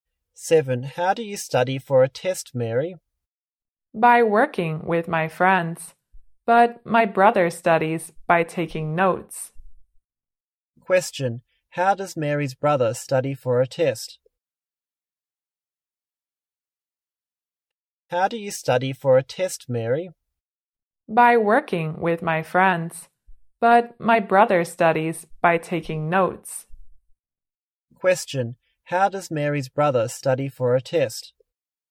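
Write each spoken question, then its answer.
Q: How does Mary's brother study for a test?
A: By taking notes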